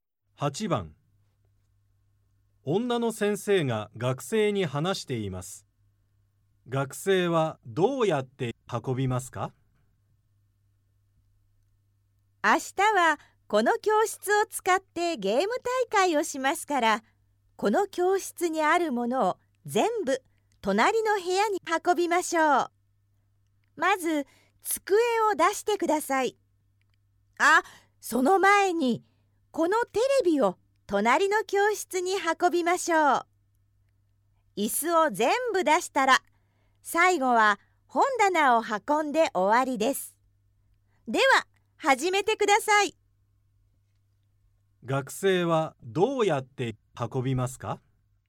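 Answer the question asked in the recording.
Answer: テレビ→机→椅子→本棚の順に運ぶ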